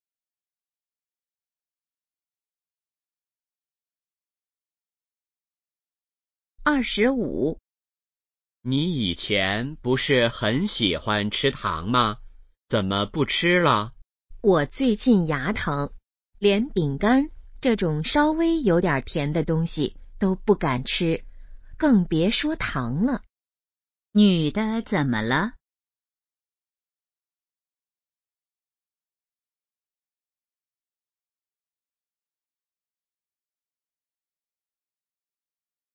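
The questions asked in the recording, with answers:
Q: 女的怎么了?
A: 牙疼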